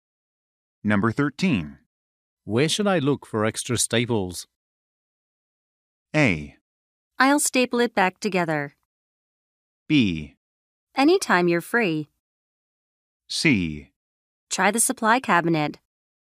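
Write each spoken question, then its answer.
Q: Where should I look for extra staples?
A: C: Try the supply cabinet.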